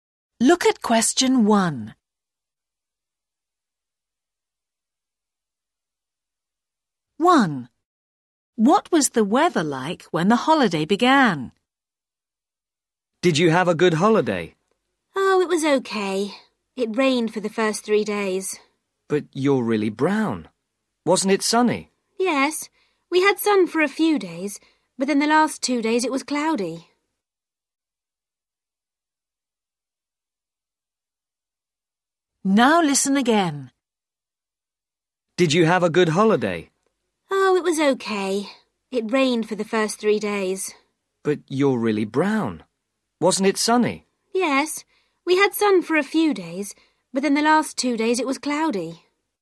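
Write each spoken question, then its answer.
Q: What was the weather like when the holiday began?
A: Rainy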